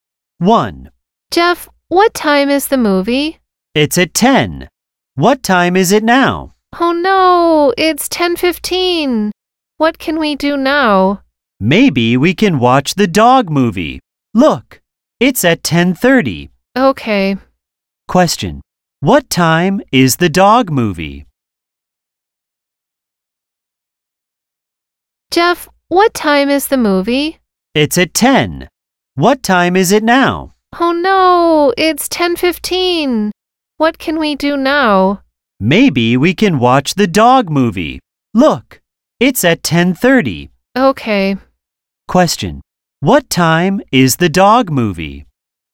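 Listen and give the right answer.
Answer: At 10:30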